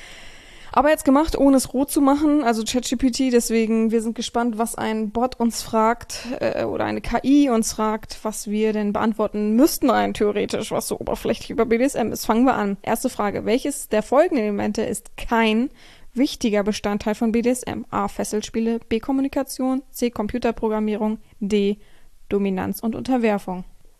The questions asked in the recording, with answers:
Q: welches der folgenden Elemente ist kein wichtiger Bestandteil von BDSM?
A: Antwort Nummer 1, C, Computerprogrammierung, ist richtig.